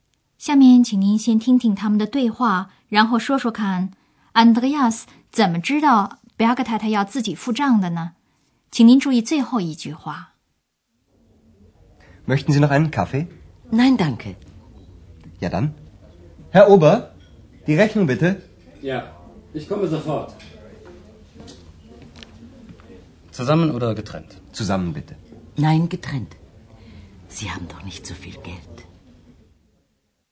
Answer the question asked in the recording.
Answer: 这个时候 ,Berg 太太说她想自己付钱。她说:"不,分开付。"